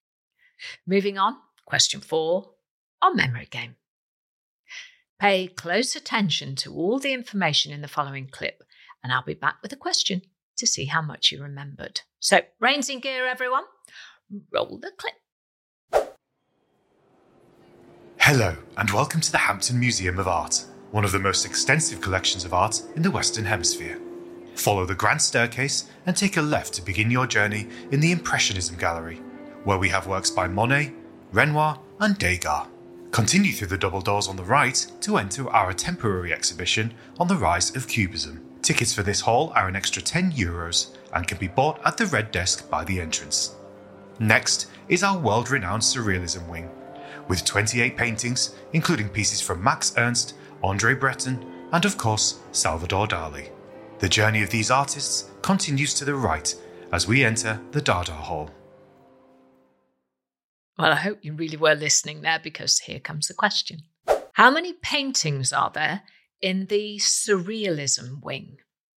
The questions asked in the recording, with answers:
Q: How many paintings are there in the Surrealism Wing?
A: The answer was 28 paintings.